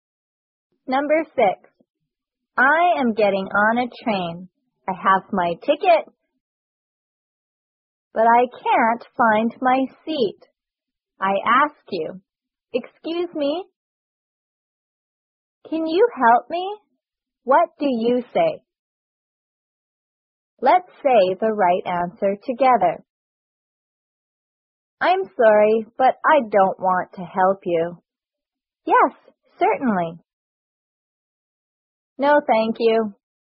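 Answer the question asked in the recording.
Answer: Yes, certainly.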